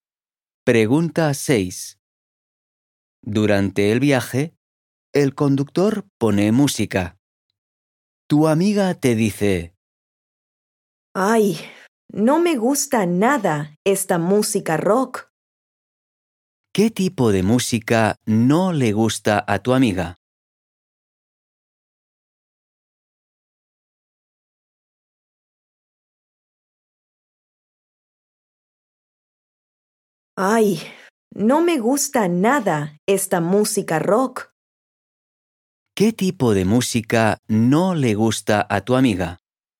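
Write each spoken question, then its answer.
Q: ¿Qué tipo de música no le gusta a tu amiga?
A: La música rock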